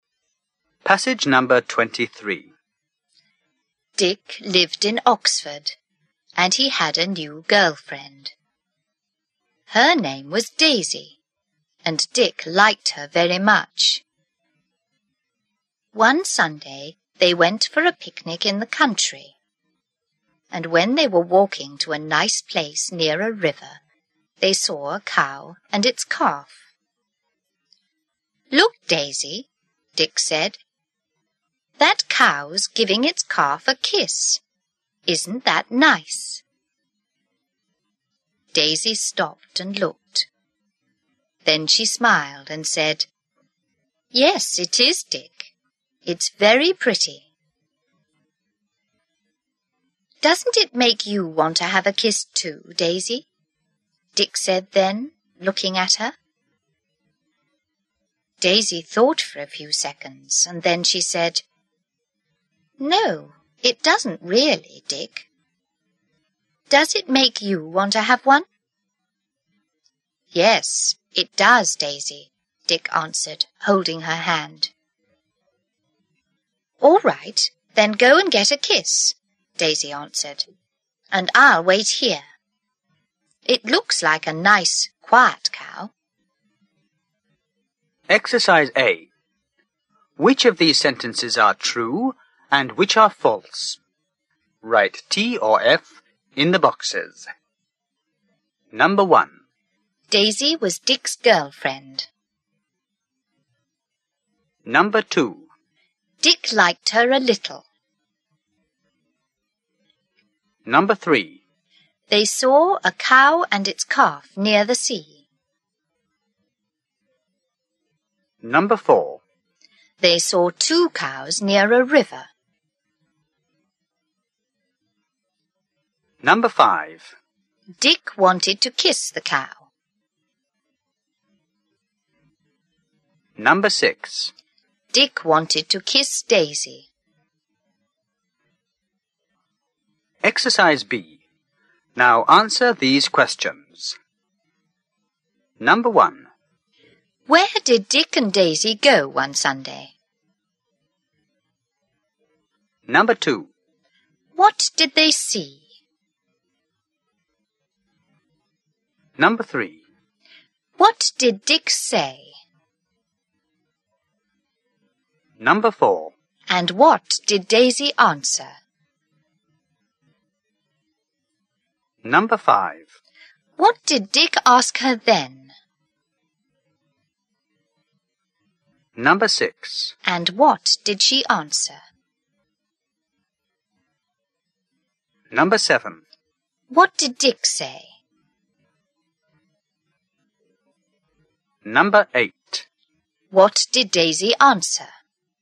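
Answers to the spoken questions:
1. True
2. False
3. False
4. False
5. False
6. True
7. For a picnic in the country
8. A cow and its calf
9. Look, Daisy, that cow's giving its calf a kiss. Isn't that nice?
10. Yes, it is, Dick. It's very pretty.
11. Doesn't it make you want to have a kiss too, Daisy?
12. No, it doesn't really, Dick. Does it make you want to have one?
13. Yes, it does, Daisy.
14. All right, then go and get a kiss, and I'll wait here. It looks like a nice, quiet cow.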